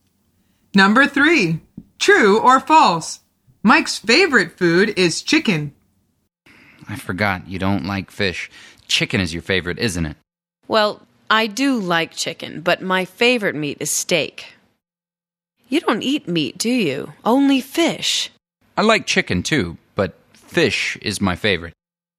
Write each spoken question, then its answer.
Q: Mike's favorite food is chicken.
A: The answer is false. Mike says, I like chicken, too, but fish is my favorite.